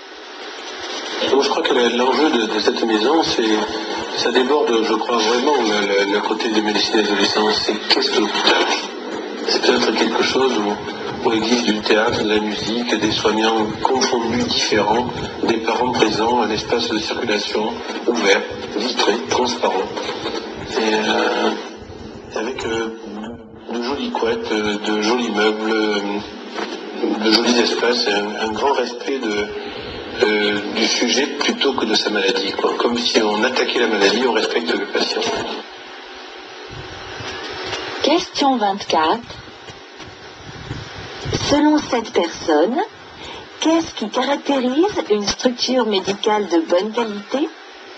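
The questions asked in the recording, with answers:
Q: Selon cette personne, qu'est-ce qui caractérise une structure médicale de bonne qualité ?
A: Un grand respect du patient plutôt que de sa maladie, dans un lieu ouvert et agréable (théâtre, musique, parents présents)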